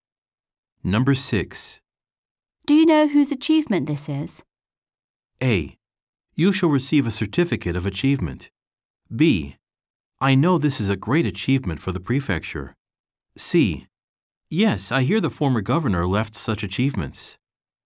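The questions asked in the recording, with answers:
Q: Do you know whose achievement this is?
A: C: Yes, I hear the former governor left such achievements.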